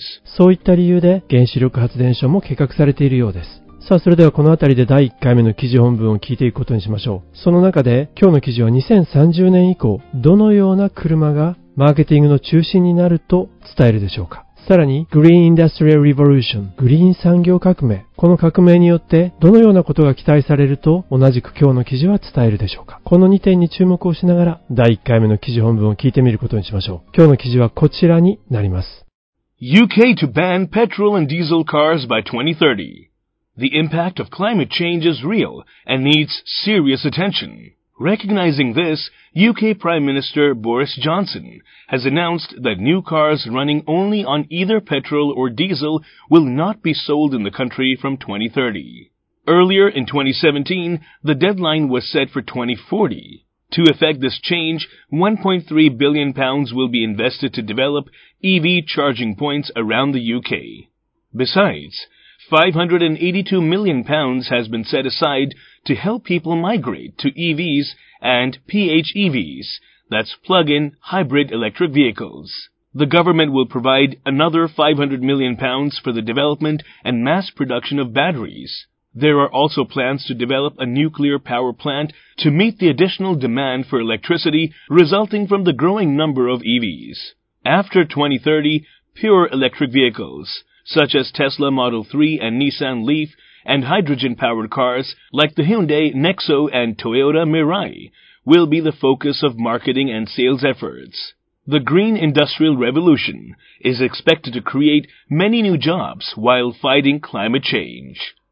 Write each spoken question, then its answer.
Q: 今日の記事は2030年以降、どのような車がマーケティングの中心になると伝えるでしょうか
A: こうした純粋な EV や水素自動車が will be the focus of marketing and sales efforts マーケティングや販売のフォーカス中心になっていくだろうということなんですね

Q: この革命によって、どのようなことが期待されると、同じく今日の記事は伝えるでしょうか。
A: この革命は is expected 期待されている to create many new jobs 多くの雇用の創出を期待されている。